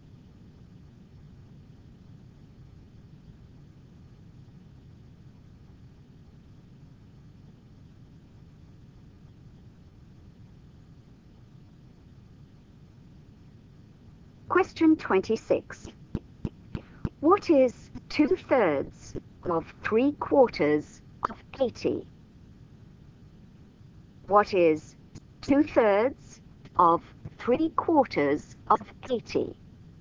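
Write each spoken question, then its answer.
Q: What is 2/3 of 3/4 of 80?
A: 40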